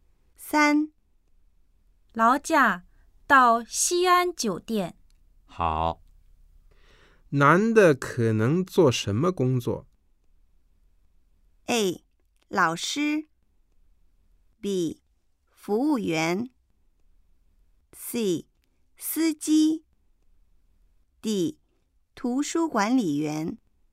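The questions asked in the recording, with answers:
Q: 男的可能做什么工作?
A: C: 司机。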